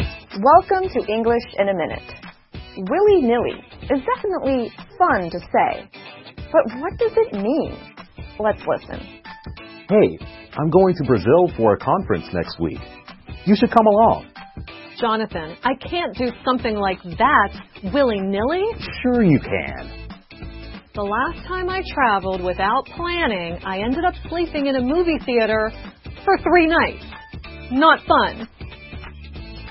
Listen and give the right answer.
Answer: willy-nilly describes something we do quickly and carelessly, without much thought or planning.